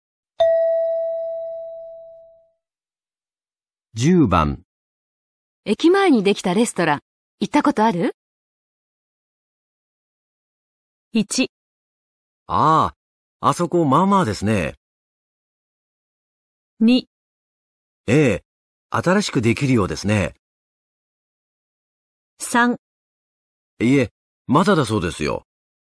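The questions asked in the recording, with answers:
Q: 駅前にできたレストラン、行ったことある?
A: 1: ああ、あそこまあまあですね。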